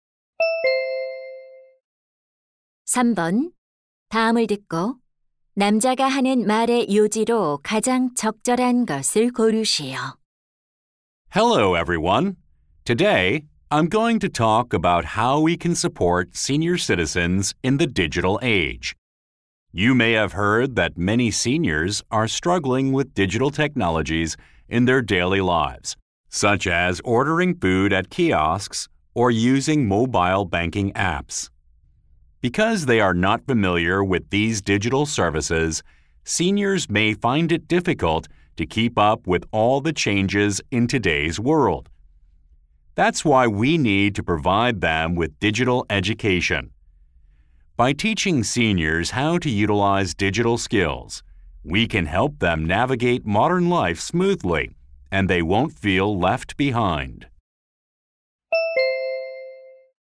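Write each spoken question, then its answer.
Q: 다음을 듣고 남자가 하는 말의 요지로 가장 적절한 것을 고르시오.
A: 노인들이 디지털 시대에 적응하도록 디지털 교육을 제공해야 한다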